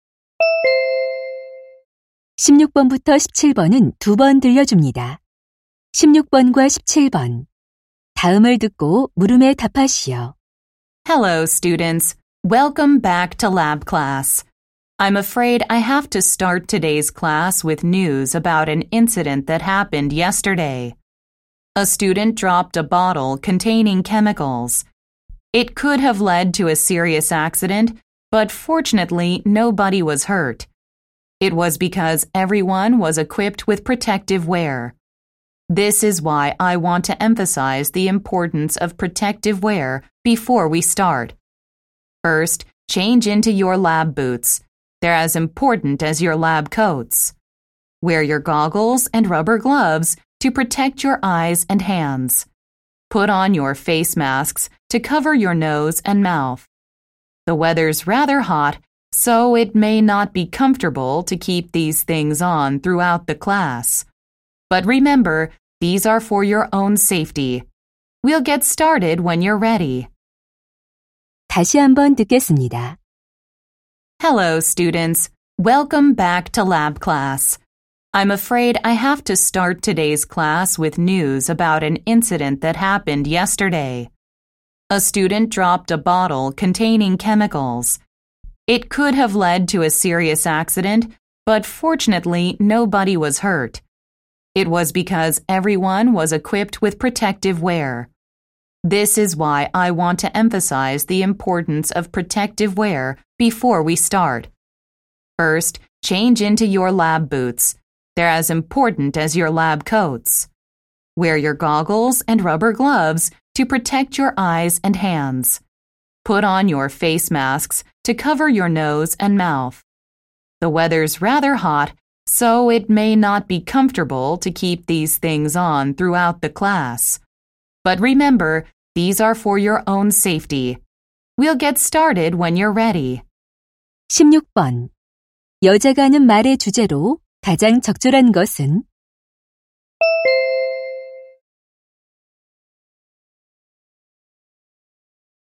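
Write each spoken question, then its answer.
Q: 여자가 하는 말의 주제로 가장 적절한 것은?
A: 실험실 보호 장비 착용의 중요성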